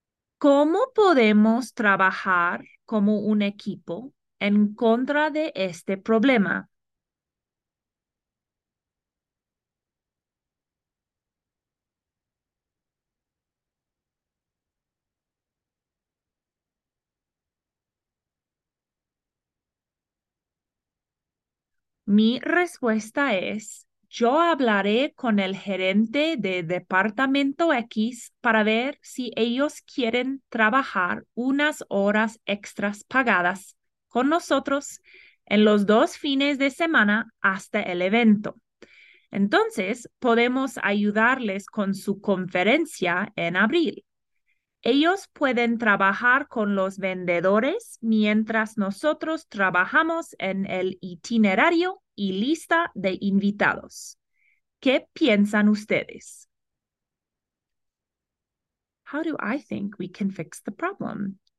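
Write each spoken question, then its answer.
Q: How do I think we can fix the problem?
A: Ask department X to work paid overtime on the two weekends before the event, and help them with their April conference in return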